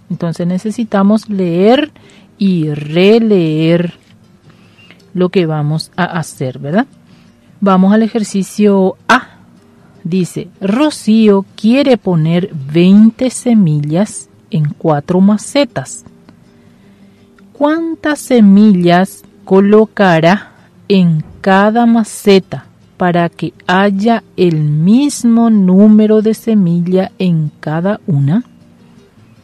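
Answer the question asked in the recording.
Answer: 5 semillas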